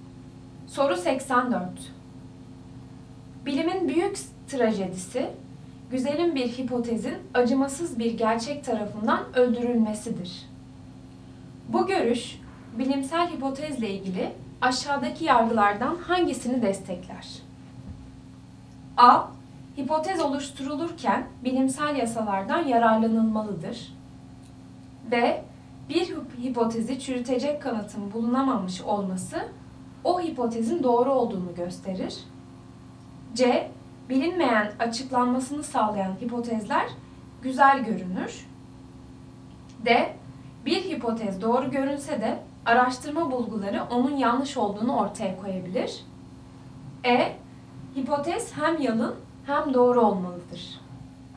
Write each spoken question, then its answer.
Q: Bu görüş, bilimsel hipotezle ilgili aşağıdaki yargılardan hangisini destekler?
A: Doğru cevap D. Bir hipotez doğru görünse de araştırma bulguları onun yanlış olduğunu ortaya koyabilir.